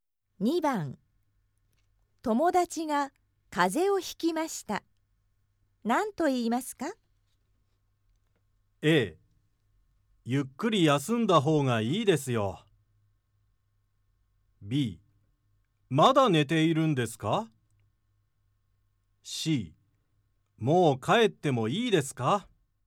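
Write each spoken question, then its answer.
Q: 友達が風邪をひきました。何と言いますか?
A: A: ゆっくり休んだ方がいいですよ。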